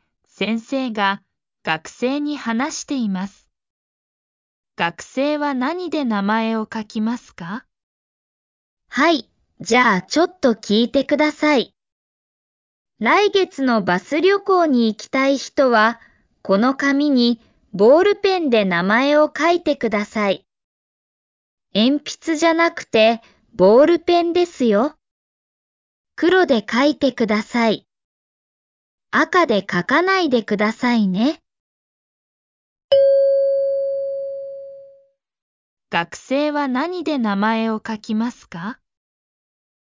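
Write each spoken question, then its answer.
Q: 学生は何で名前を書きますか?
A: 黒いボールペン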